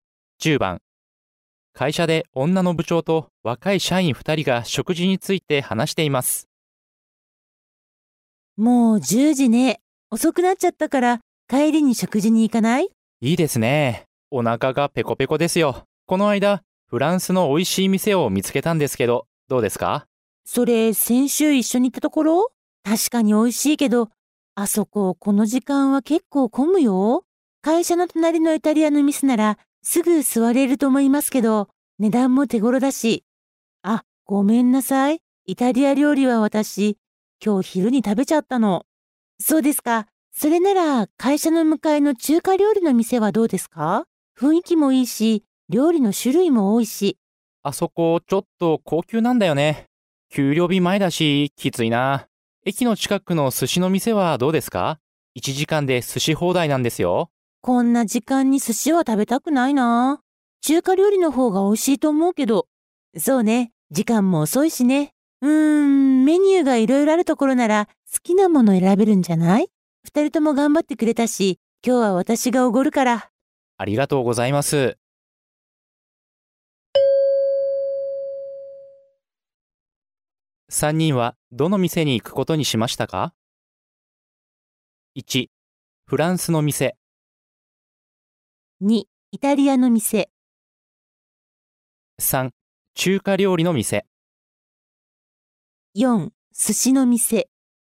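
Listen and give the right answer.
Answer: 3: 中華料理の店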